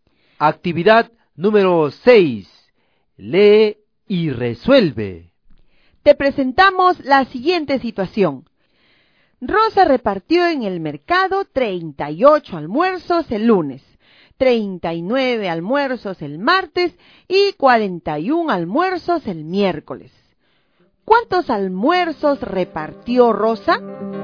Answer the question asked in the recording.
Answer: Rosa repartió 118